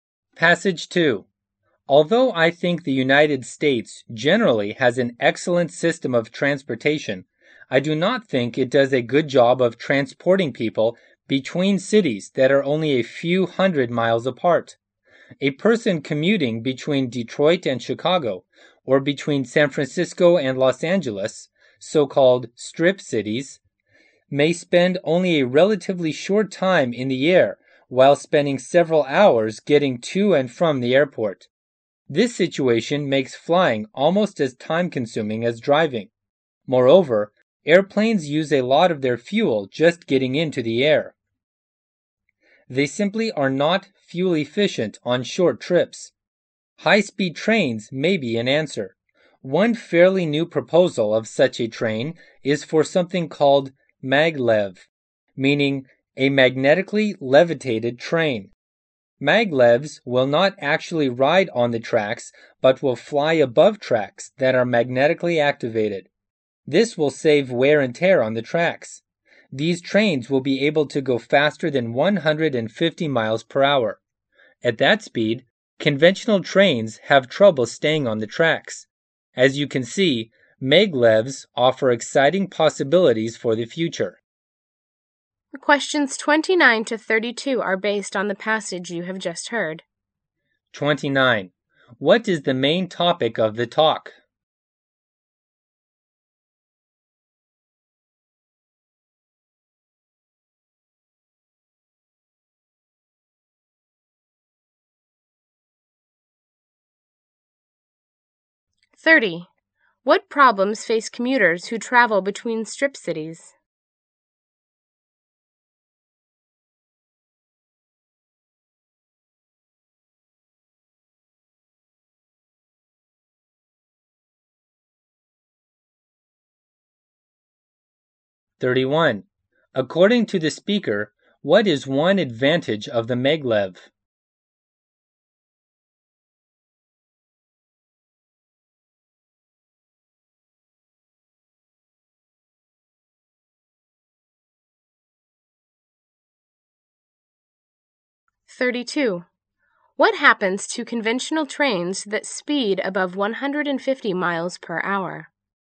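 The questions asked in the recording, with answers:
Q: What is the main topic of the talk?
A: Maglev high-speed trains for travel between nearby cities

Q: What problems face commuters who travel between strip cities?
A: They spend hours getting to and from the airport

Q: According to the speaker, what is one advantage of the maglev?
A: It saves wear and tear on the tracks

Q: What happens to conventional trains that speed above 150 miles per hour?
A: They have trouble staying on the tracks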